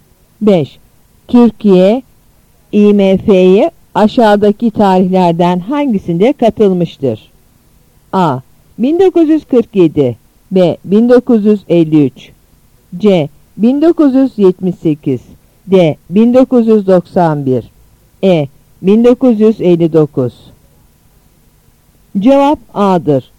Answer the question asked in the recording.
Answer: Cevap A'dır.